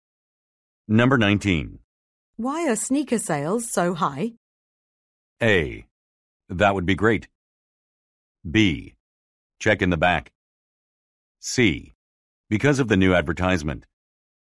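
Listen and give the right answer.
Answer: C: Because of the new advertisement.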